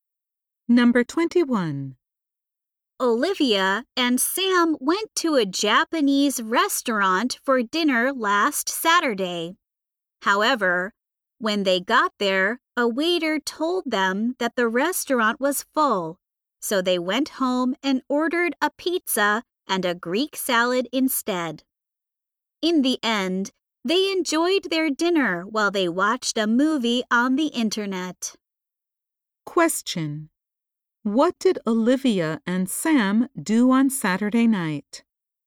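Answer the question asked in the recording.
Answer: They ordered a pizza and a Greek salad and watched a movie at home.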